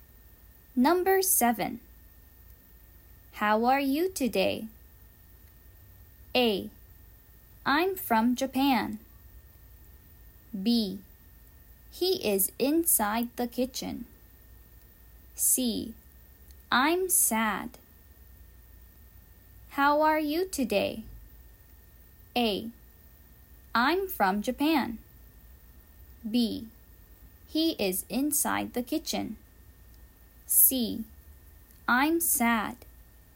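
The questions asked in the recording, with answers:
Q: How are you today?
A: C: I'm sad.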